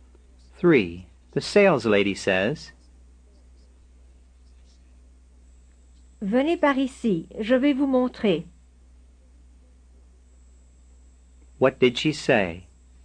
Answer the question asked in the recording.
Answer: Come this way, I'll show you.